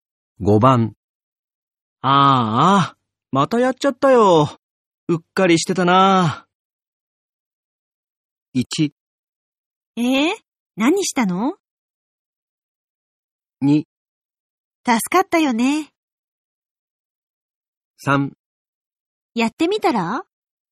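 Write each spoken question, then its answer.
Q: ああ、またやっちゃったよ。うっかりしてたな。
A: 1: 何したの?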